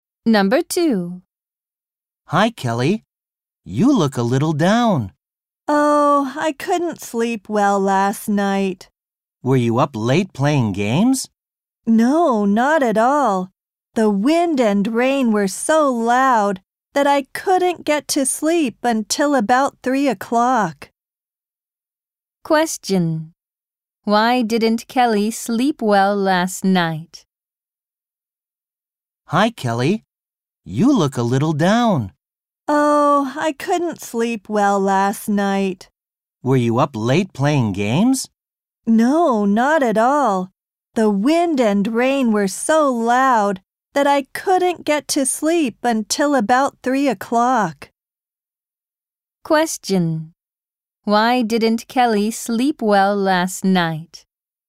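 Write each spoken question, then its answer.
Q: Why didn't Kelly sleep well last night?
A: Because the wind and rain were so loud.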